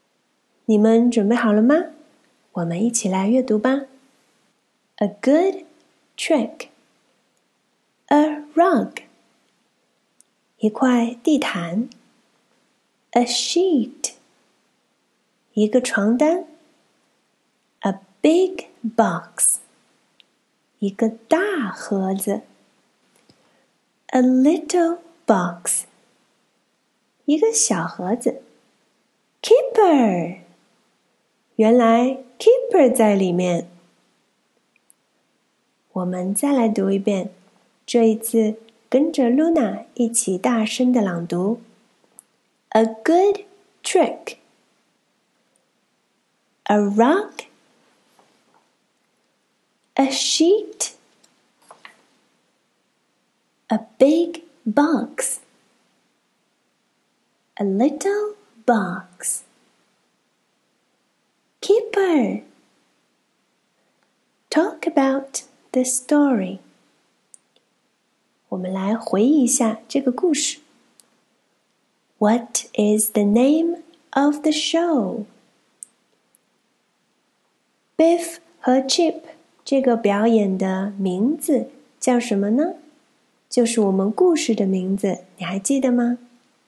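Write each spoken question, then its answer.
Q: What is the name of the show?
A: A Good Trick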